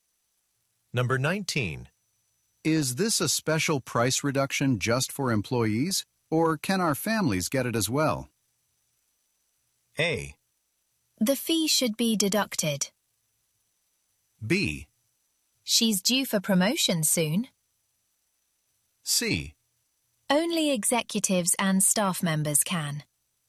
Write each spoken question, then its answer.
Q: Is this a special price reduction just for employees, or can our families get it as well?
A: 19번도 지금 정답 C번으로서 오직 임원진들과 스텝 많이 할 수 있습니다.